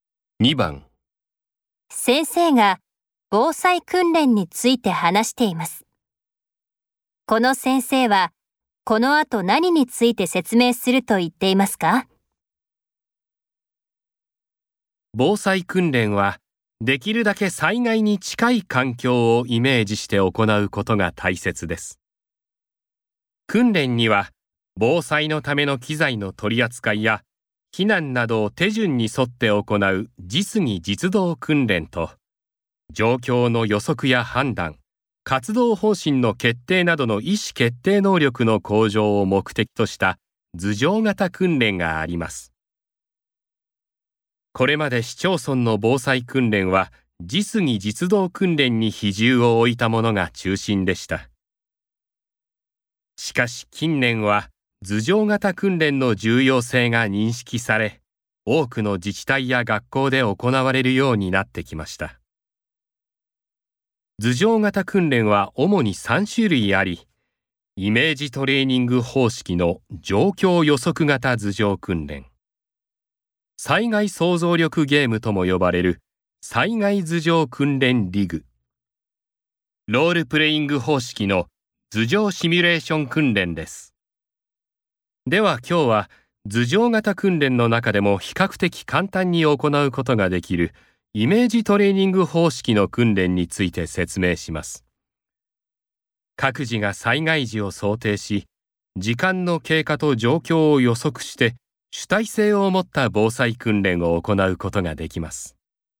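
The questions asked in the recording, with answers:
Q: この先生はこの後何について説明すると言っていますか?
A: イメージトレーニング方式の図上型訓練(状況予測型図上訓練)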